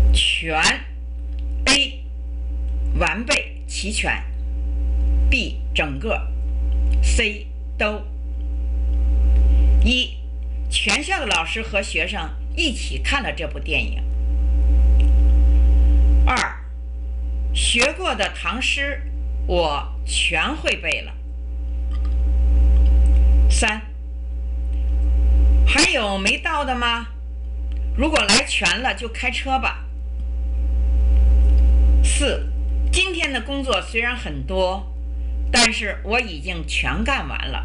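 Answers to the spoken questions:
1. B: 整个
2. C: 都
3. A: 完备齐全
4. C: 都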